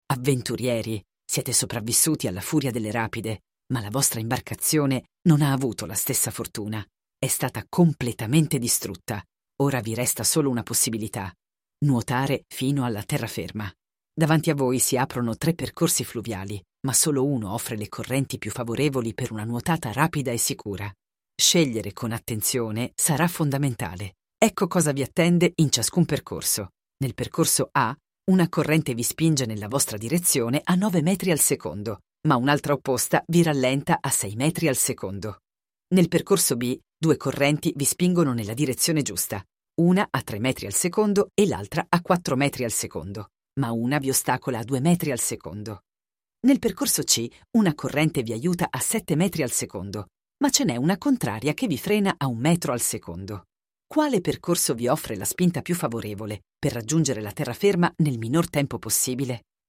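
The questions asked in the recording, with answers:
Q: Quale percorso vi offre la spinta più favorevole per raggiungere la terraferma nel minor tempo possibile?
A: C: una corrente vi aiuta a 7 metri al secondo, una contraria a 1 metro al secondo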